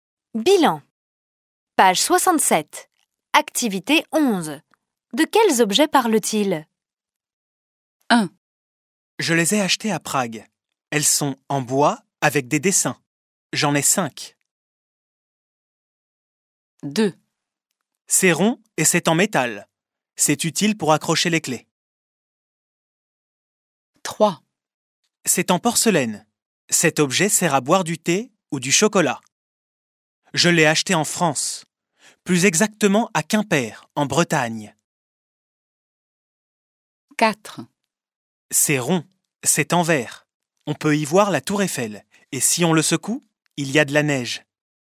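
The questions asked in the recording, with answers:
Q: De quels objets parle-t-il ?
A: un porte-clés

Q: De quels objets parle-t-il ?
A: une boule à neige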